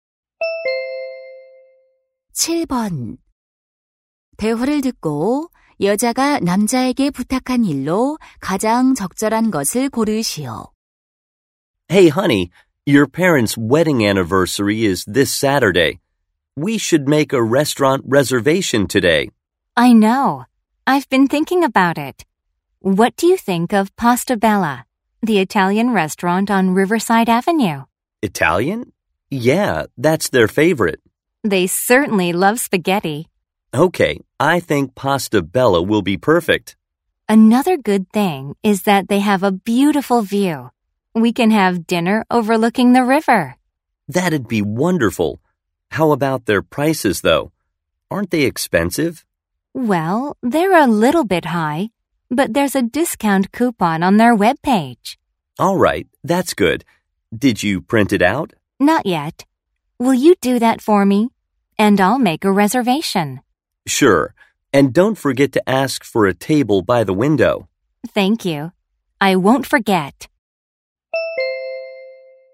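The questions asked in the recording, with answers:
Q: 대화를 듣고 여자가 남자에게 부탁한 일로 가장 적절한 것을 고르시오.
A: 할인 쿠폰 출력하기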